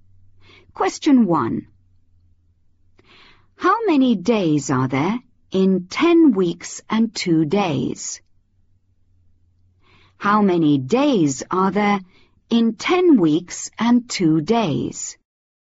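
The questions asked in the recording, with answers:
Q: How many days are there in 10 weeks and 2 days?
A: 72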